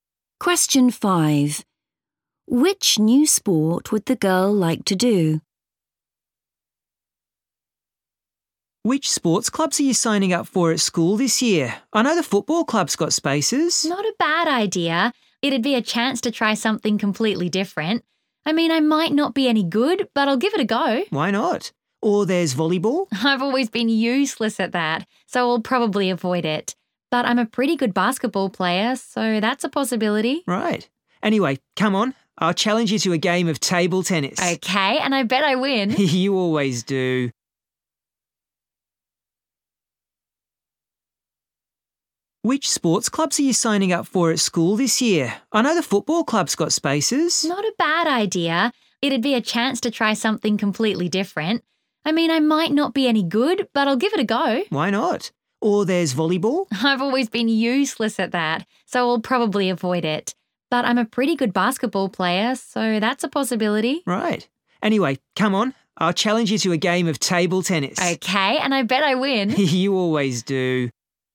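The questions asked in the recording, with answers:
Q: Which new sport would the girl like to do?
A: football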